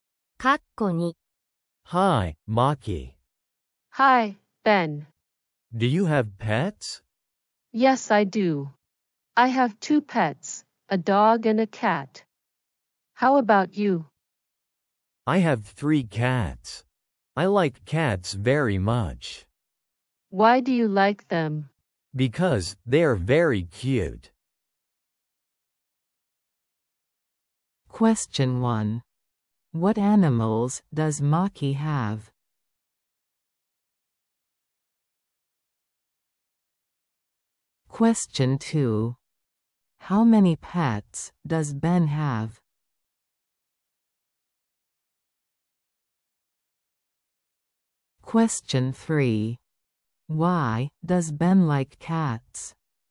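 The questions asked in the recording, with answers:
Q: What animals does Maki have?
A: A dog and a cat

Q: How many pets does Ben have?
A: Three (3 cats)

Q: Why does Ben like cats?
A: Because they're very cute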